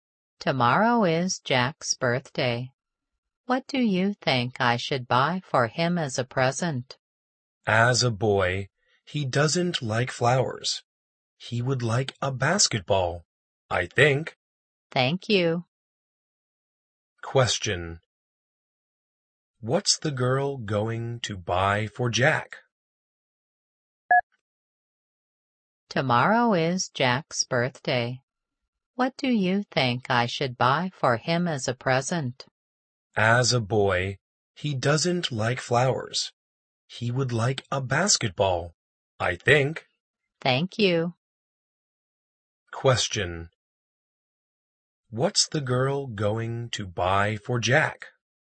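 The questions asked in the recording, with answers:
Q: What's the girl going to buy for Jack?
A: A basketball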